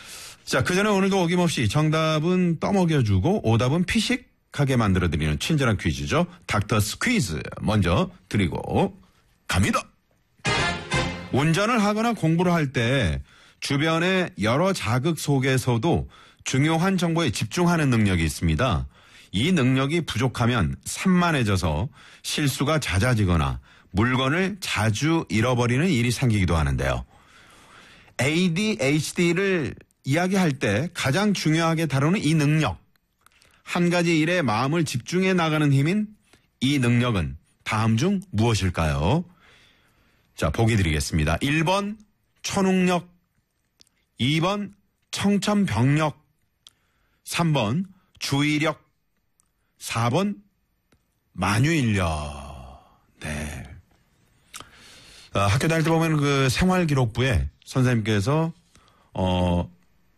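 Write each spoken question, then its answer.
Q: ADHD를 이야기할 때 가장 중요하게 다루는 이 능력, 한 가지 일에 마음을 집중해 나가는 힘인 이 능력은 다음 중 무엇일까요?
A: 3: 주의력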